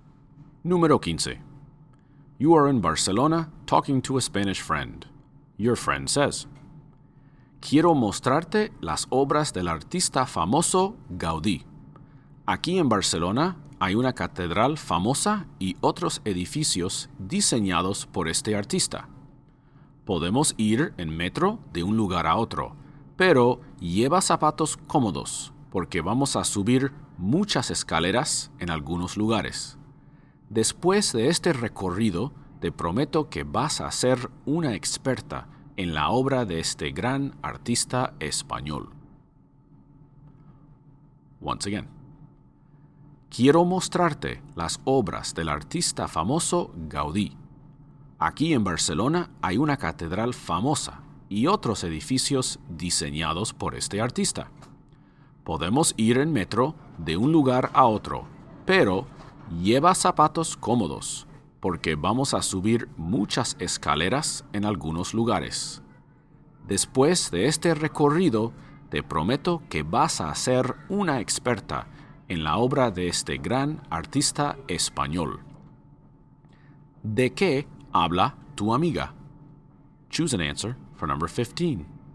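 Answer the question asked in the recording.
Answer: De un recorrido para ver las obras de Gaudí en Barcelona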